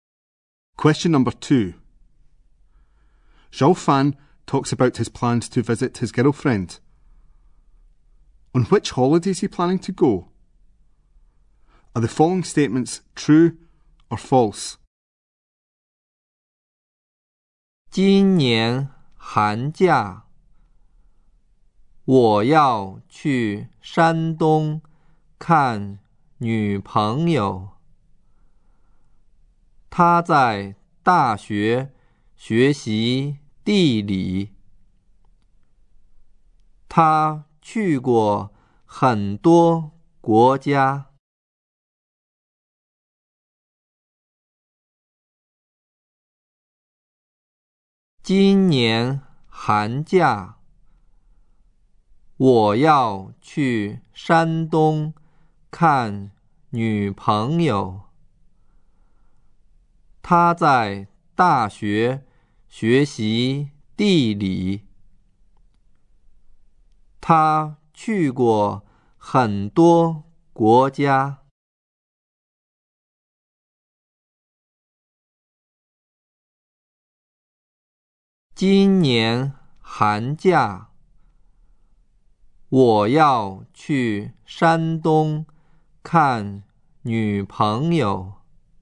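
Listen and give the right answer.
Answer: The winter holiday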